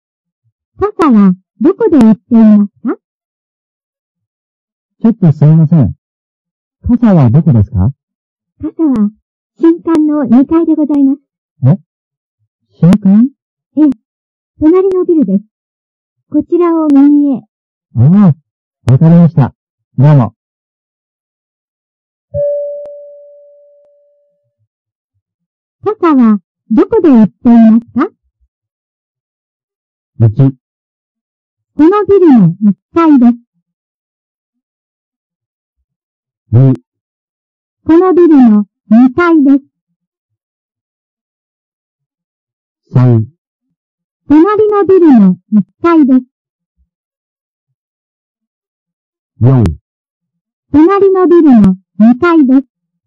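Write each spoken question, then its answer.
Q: 傘はどこで売っていますか?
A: 4: 隣のビルの2階です。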